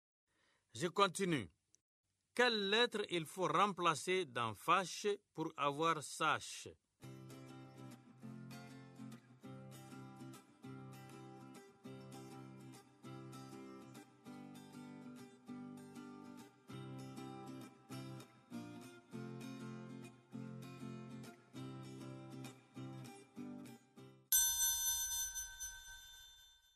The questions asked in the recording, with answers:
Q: Quelle lettre il faut remplacer dans fâche pour avoir sache?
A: Monsieur, c'est la lettre F.